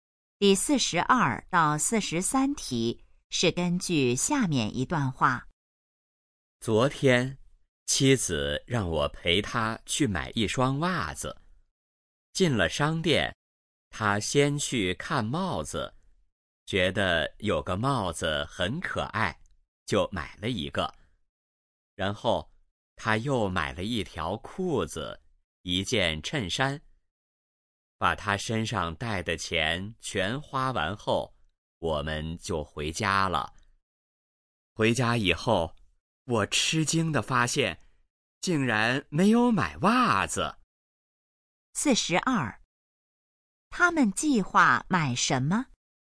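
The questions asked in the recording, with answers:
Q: 他们计划买什么?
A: 袜子

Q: 说话人是谁?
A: 丈夫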